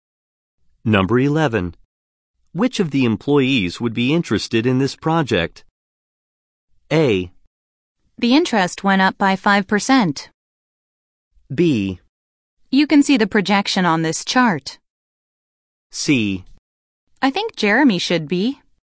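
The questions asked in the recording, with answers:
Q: Which of the employees would be interested in this project?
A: C: I think Jeremy should be.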